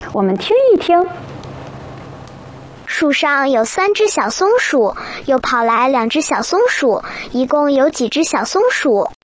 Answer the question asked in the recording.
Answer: 3+2=5,